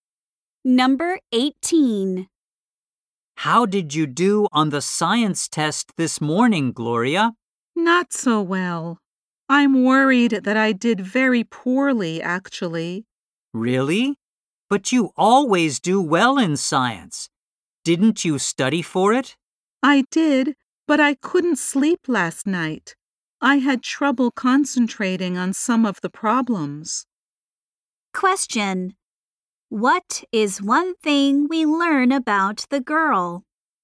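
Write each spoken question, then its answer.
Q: What is one thing we learn about the girl?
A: She couldn't sleep last night.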